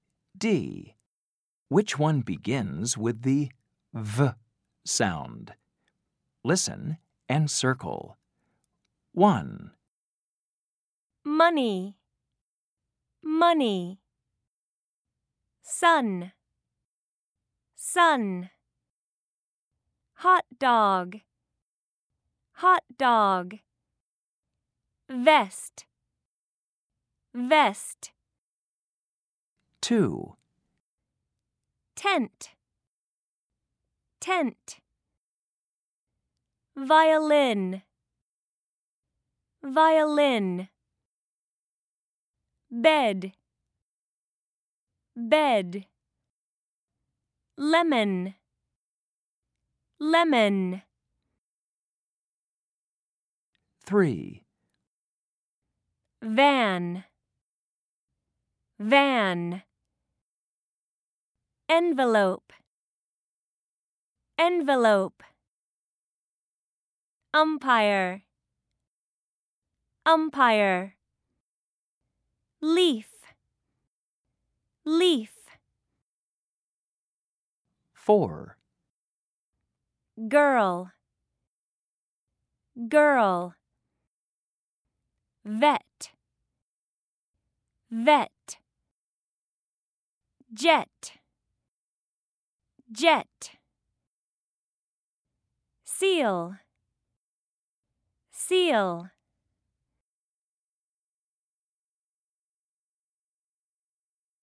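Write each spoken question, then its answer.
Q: Which one begins with the V sound?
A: Vest

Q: Which one begins with the V sound?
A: Violin

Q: Which one begins with the V sound?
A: Van

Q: Which one begins with the V sound?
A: Vet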